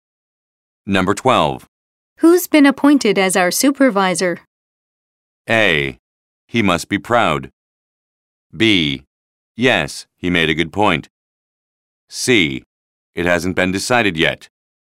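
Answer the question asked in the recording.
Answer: C: It hasn't been decided yet.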